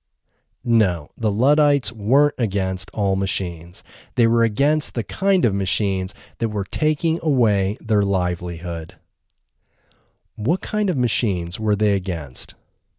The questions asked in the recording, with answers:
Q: What kind of machines were they against?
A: They were against the kinds of machines that were taking away their livelihood.